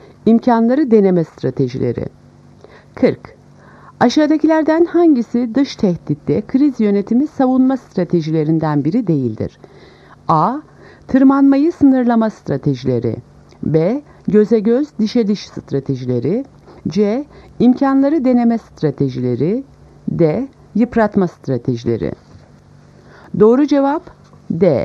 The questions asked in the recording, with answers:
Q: Aşağıdakilerden hangisi dış tehditte kriz yönetimi savunma stratejilerinden biri değildir?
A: Doğru cevap D. Yıpratma stratejileri.